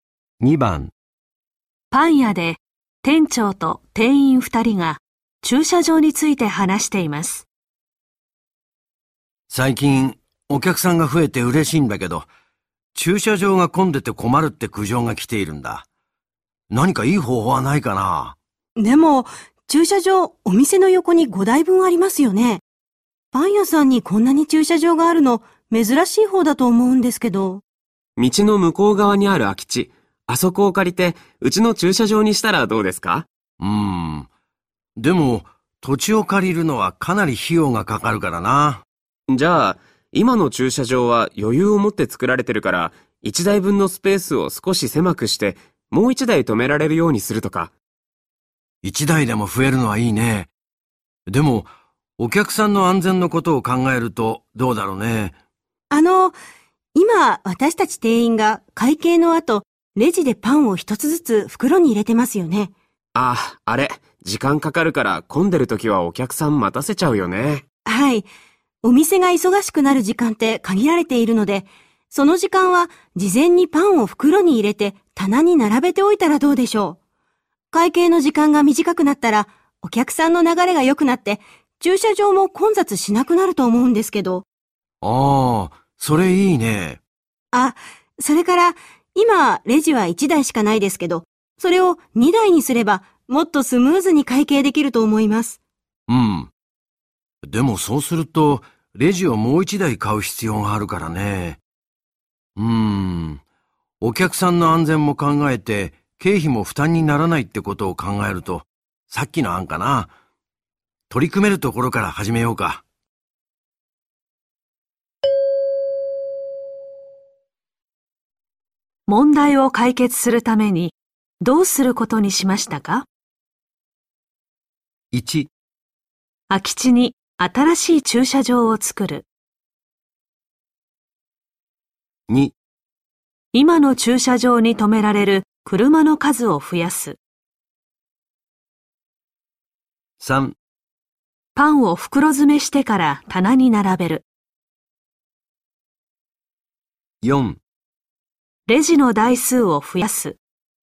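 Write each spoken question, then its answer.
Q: 問題を解決するためにどうすることにしましたか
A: 3: パンを袋詰めしてから棚に並べる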